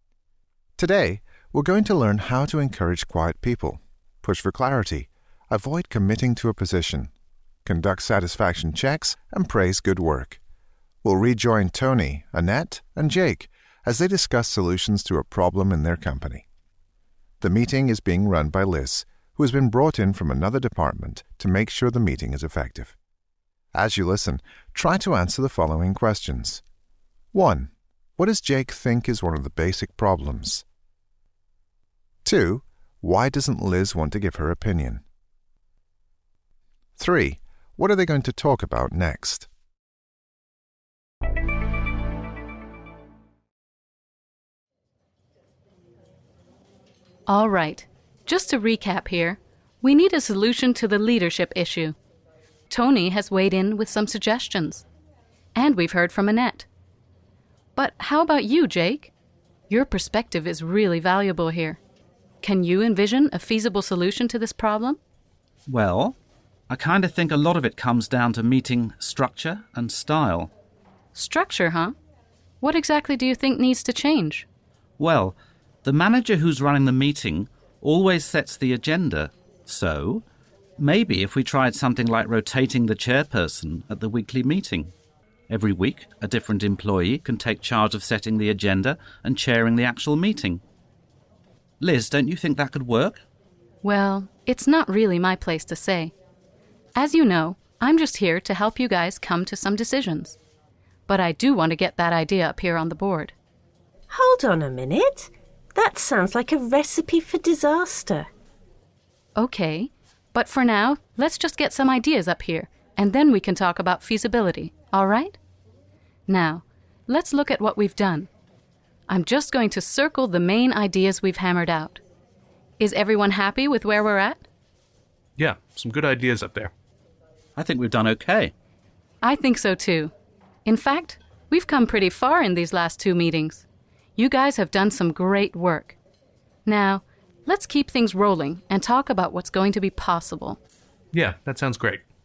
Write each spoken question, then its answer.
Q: What does Jake think is one of the basic problems?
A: Jake believes that the problem comes down to meeting structure and style.

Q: Why doesn't Liz want to give her opinion?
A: Her job is simply to help the group come to decisions, so she has to avoid committing to a position.